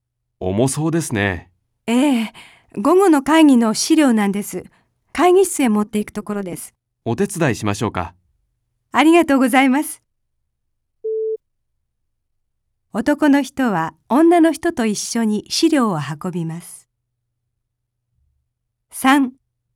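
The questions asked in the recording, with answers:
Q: 男の人は女の人と一緒に資料を運びます。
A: ○(正しい)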